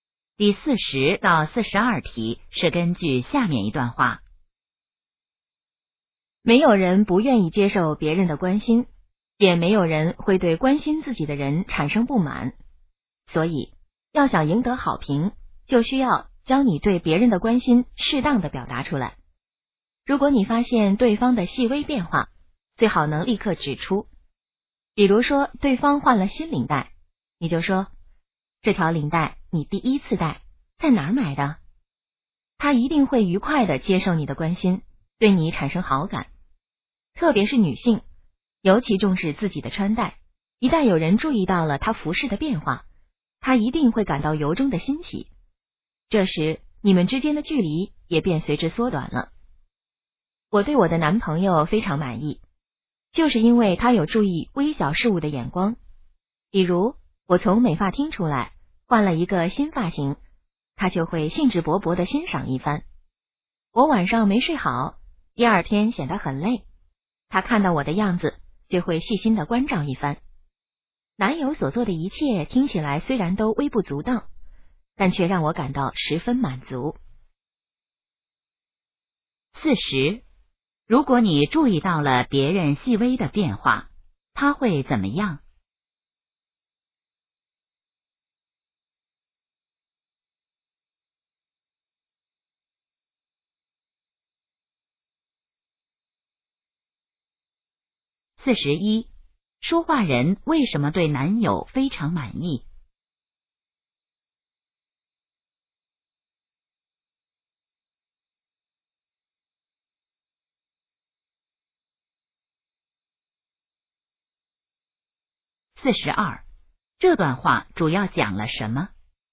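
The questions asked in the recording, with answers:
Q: 如果你注意到了别人细微的变化,他会怎么样?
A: 愉快地接受你的关心,对你产生好感

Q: 说话人为什么对男友非常满意?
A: 他能注意到微小的事物

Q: 这段话主要讲了什么?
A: 要适当表达对别人的关心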